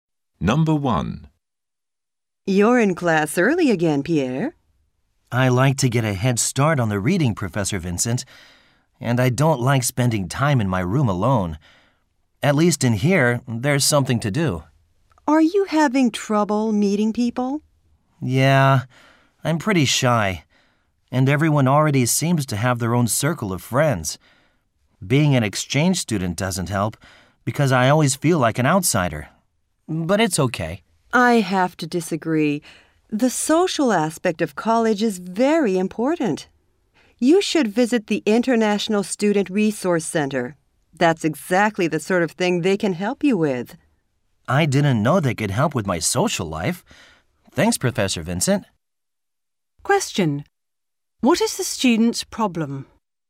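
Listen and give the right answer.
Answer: He is shy and has trouble making friends as an exchange student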